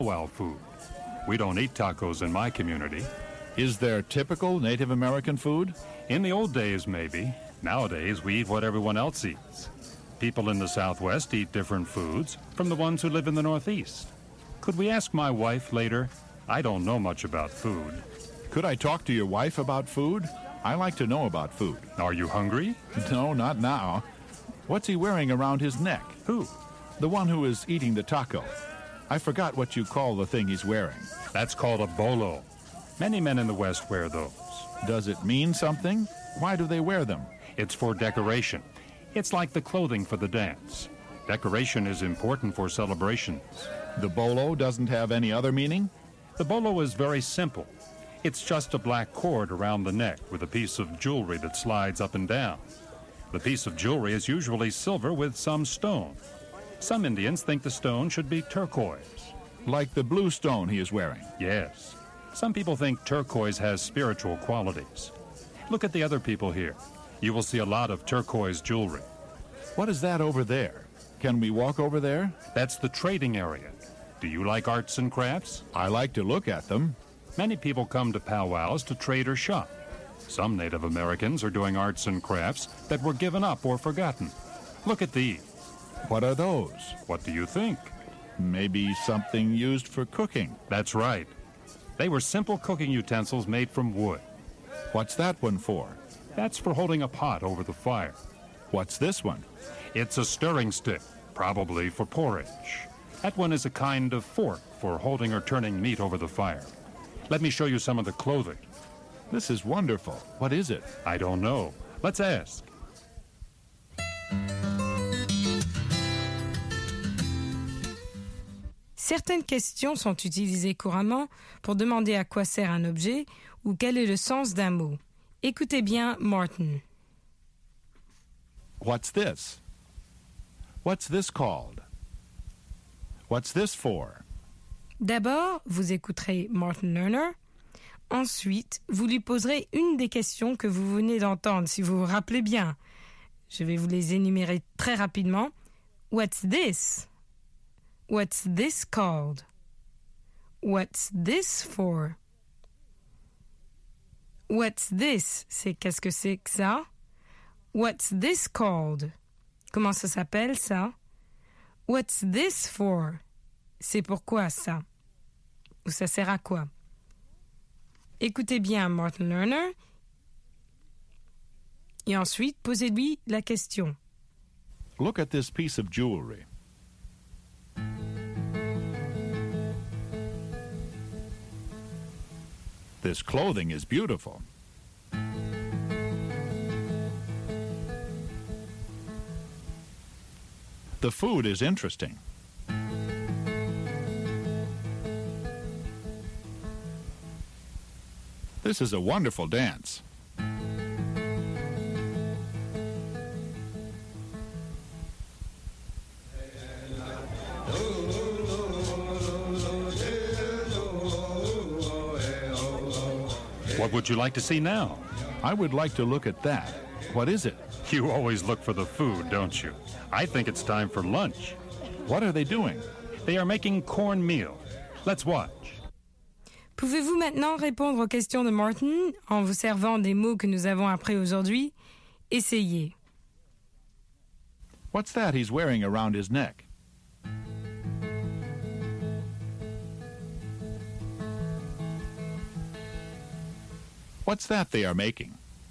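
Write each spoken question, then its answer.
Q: What's that he's wearing around his neck?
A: A bolo

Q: What's that they are making?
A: Cornmeal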